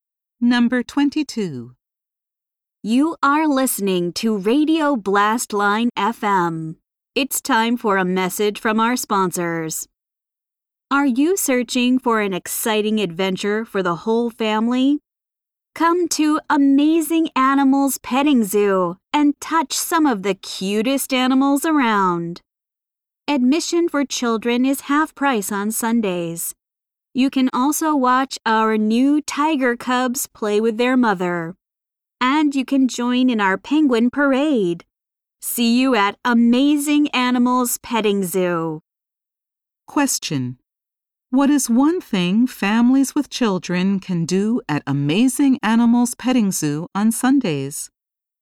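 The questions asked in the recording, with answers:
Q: What is one thing families with children can do at Amazing Animals Petting Zoo on Sundays?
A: Get half-price admission for children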